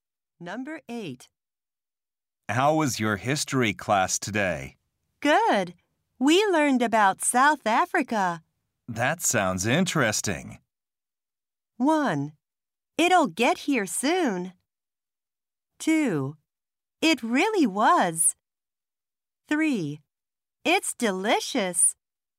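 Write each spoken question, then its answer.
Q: That sounds interesting.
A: 2: It really was.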